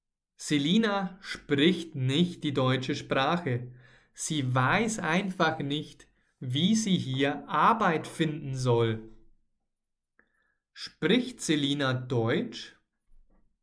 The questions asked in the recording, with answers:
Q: Spricht Selina Deutsch?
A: Nein, sie spricht nicht Deutsch.